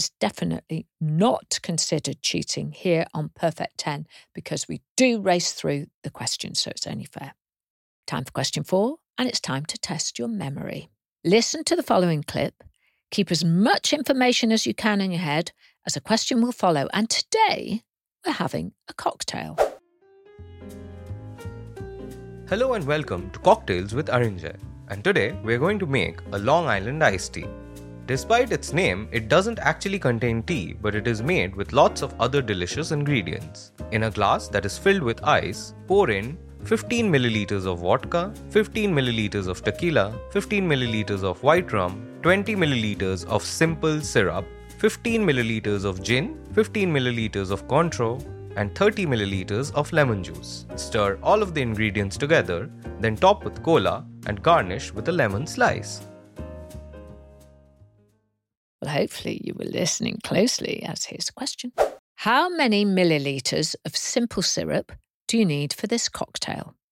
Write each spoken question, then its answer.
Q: How many milliliters of simple syrup do you need for this cocktail?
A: The answer was 20 millilitres.